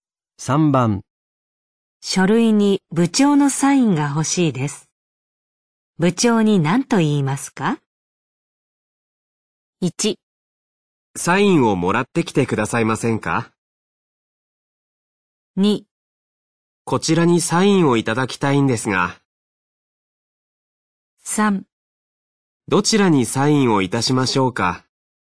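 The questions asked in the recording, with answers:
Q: 書類に部長のサインが欲しいです。部長に何と言いますか?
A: 2: こちらにサインをいただきたいんですが。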